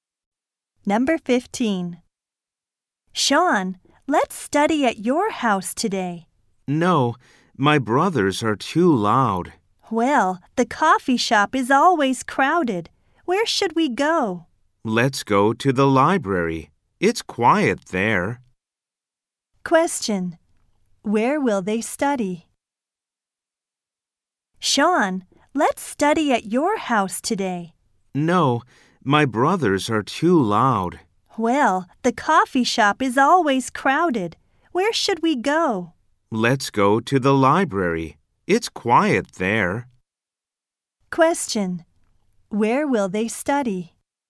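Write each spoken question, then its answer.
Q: Where will they study?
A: At the library.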